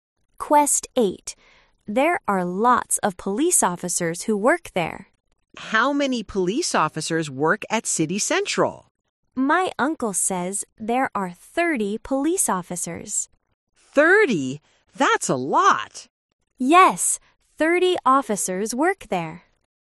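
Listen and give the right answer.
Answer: 30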